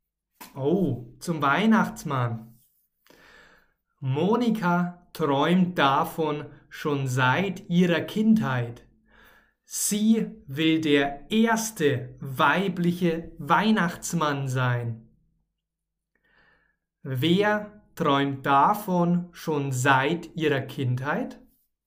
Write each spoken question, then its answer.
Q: Wer träumt davon schon seit ihrer Kindheit?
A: Monika. Monika träumt davon schon seit ihrer Kindheit.